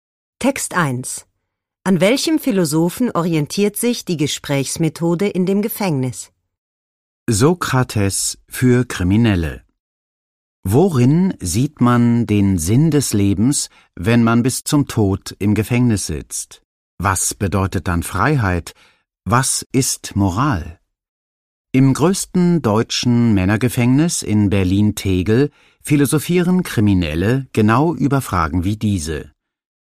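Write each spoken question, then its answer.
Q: An welchem Philosophen orientiert sich die Gesprächsmethode in dem Gefängnis?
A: An Sokrates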